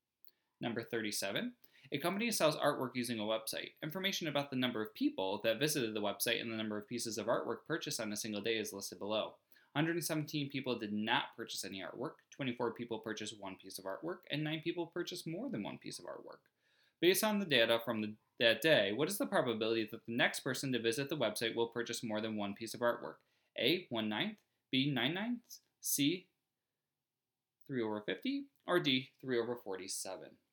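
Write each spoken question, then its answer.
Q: Based on the data from that day, what is the probability that the next person to visit the website will purchase more than one piece of artwork?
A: C: 3/50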